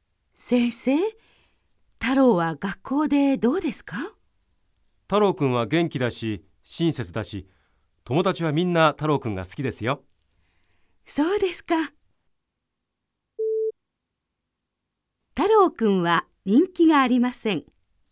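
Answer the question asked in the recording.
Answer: ×(正しくない)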